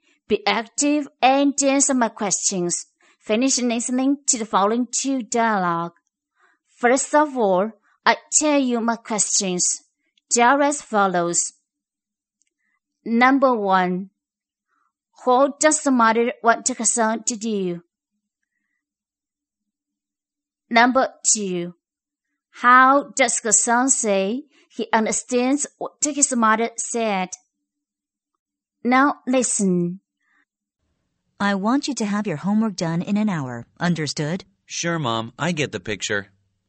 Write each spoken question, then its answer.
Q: what does the mother want her son to do?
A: the mother wants her son to get his homework done in 1 hour.